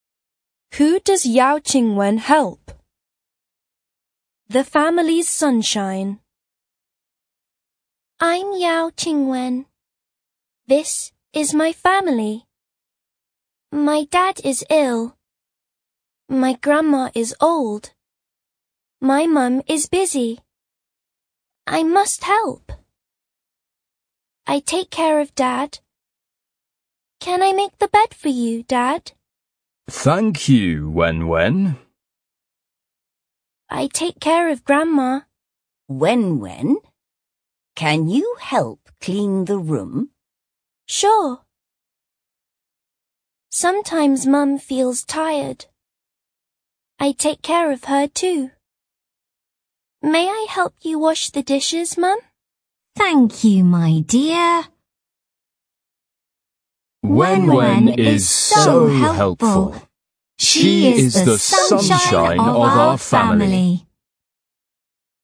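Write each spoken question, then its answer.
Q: Who does Yao Qingwen help?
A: Her dad, her grandma and her mum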